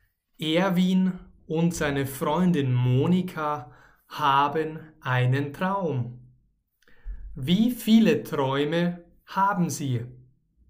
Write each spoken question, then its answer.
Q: Wie viele Träume haben sie?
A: Einen. Sie haben einen Traum.